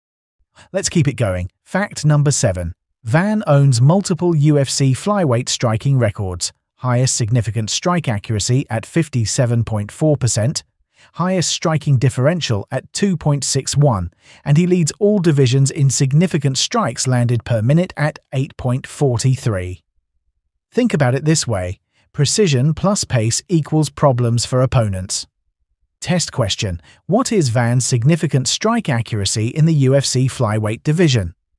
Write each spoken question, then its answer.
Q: what is Van's significant strike accuracy in the UFC flyweight division?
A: 57.4%.